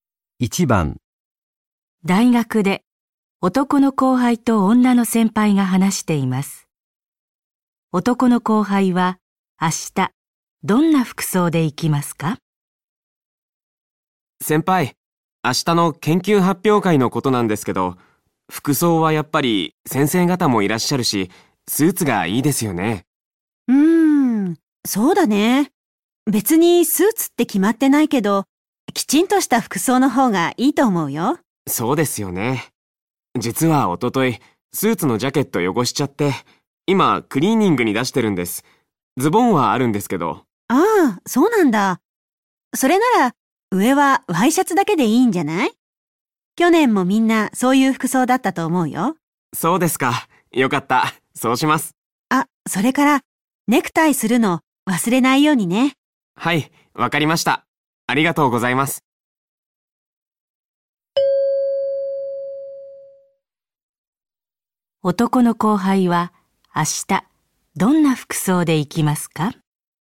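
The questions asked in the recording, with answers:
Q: 男の後輩は明日どんな服装で行きますか?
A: ワイシャツとズボンにネクタイ(ジャケットなし)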